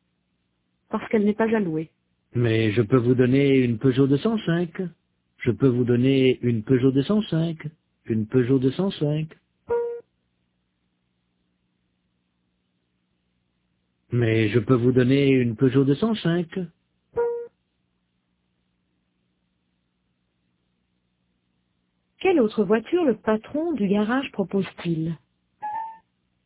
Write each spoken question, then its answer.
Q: Quelle autre voiture le patron du garage propose-t-il?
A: Une Peugeot 205.